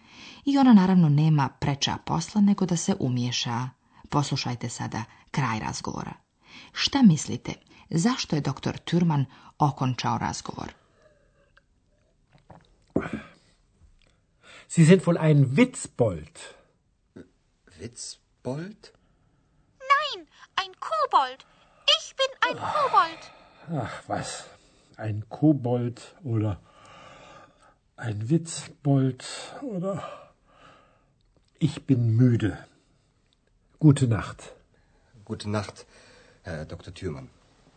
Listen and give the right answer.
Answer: I tako je doktor Türman okončao razgovor, jer je umoran, müde.